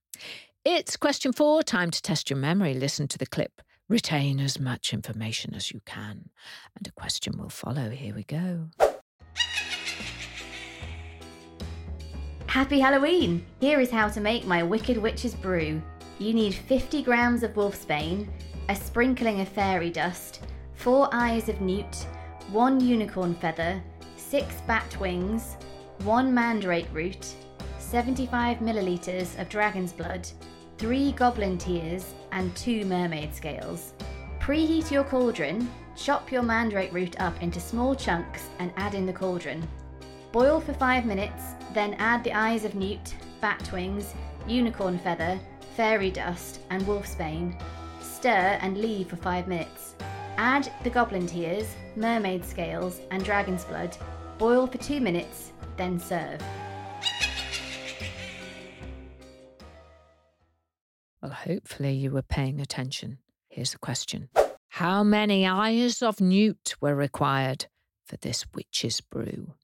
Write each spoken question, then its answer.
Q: How many eyes of newt were required for this witch's brew?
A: The answer is 4 eyes of newt.